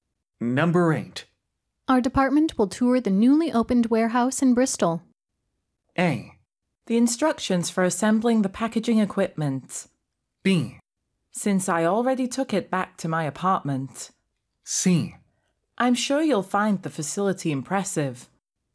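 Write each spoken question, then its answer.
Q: Our department will tour the newly opened warehouse in Bristol.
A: C: I'm sure you'll find the facility impressive.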